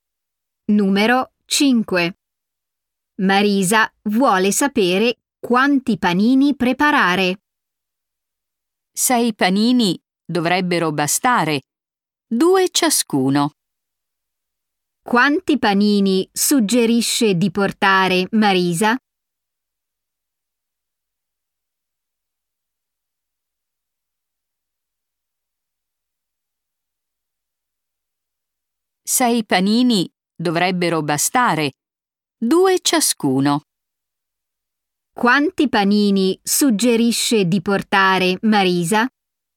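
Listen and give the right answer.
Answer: Sei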